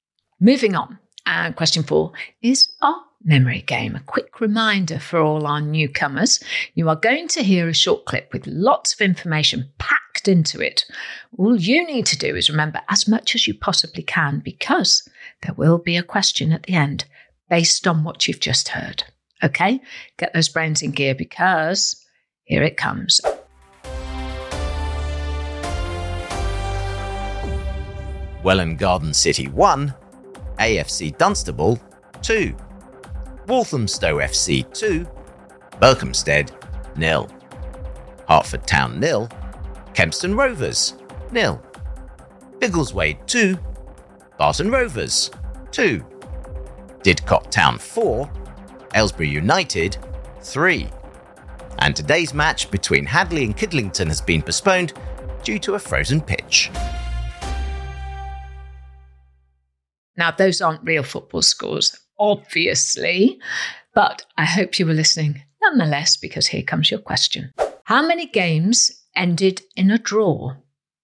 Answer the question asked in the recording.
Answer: And the answer is 2 games.